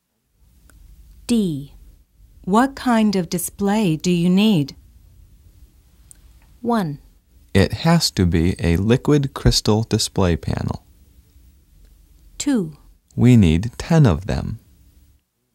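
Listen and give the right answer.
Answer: 1: It has to be a liquid crystal display panel.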